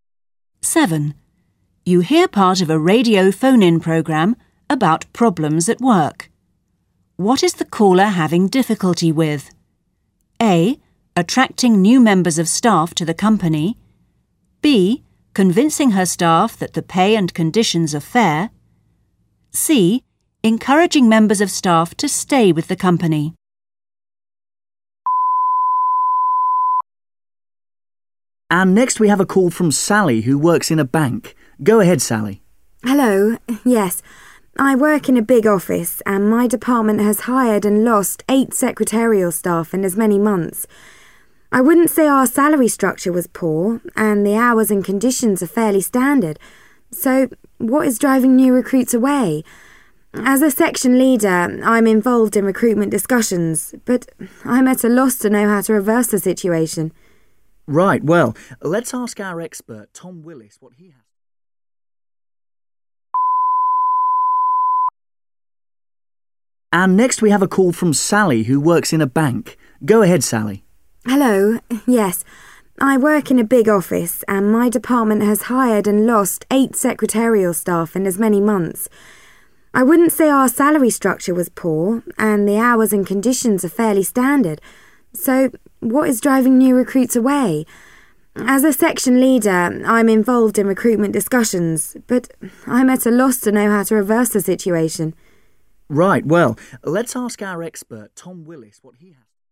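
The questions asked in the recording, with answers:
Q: What is the caller having difficulty with?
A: C: Encouraging members of staff to stay with the company.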